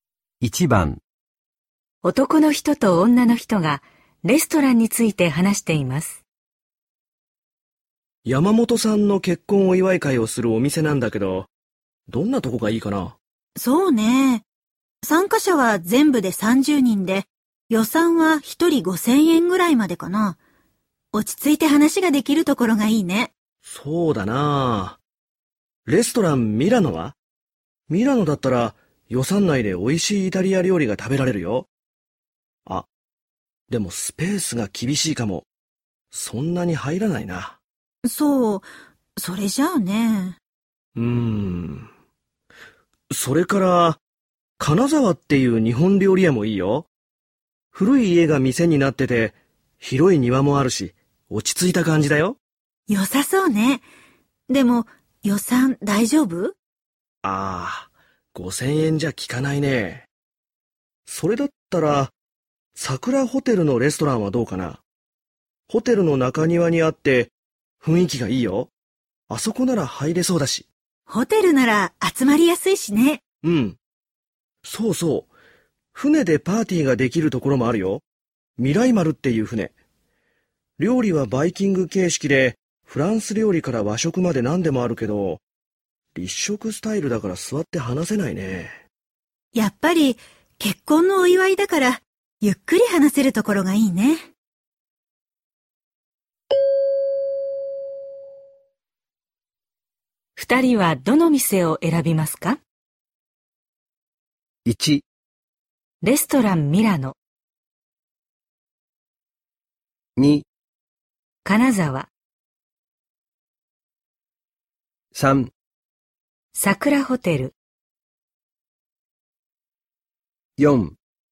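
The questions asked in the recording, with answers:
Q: 二人はどの店を選びますか?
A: 3: 桜ホテル。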